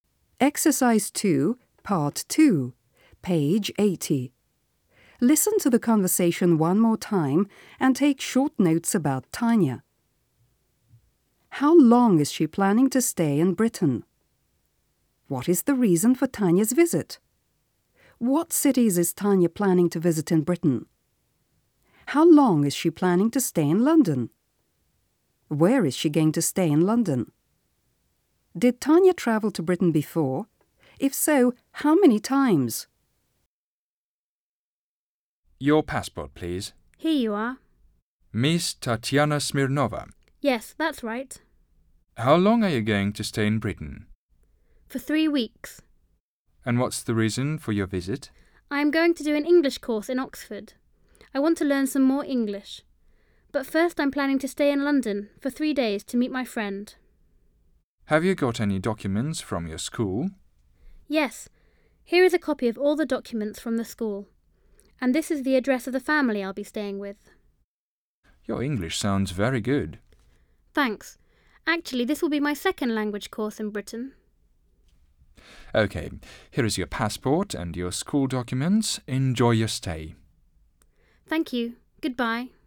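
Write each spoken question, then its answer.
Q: How long is she planning to stay in Britain?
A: For 3 weeks

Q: What is the reason for Tanya's visit?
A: To do an English course in Oxford

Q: What cities is Tanya planning to visit in Britain?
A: London and Oxford

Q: How long is she planning to stay in London?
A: 3 days

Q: Did Tanya travel to Britain before?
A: Yes

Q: If so, how many times?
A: Once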